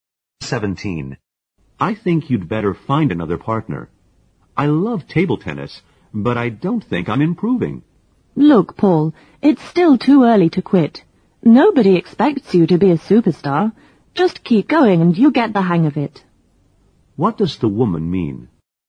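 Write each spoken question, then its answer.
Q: What does the woman mean?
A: Paul shouldn't give up; he should keep practicing table tennis.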